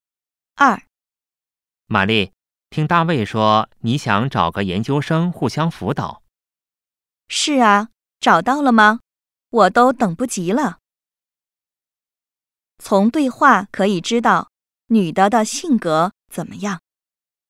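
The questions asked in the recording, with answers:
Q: 从对话可以知道女的的性格怎么样。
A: 性子急,没耐心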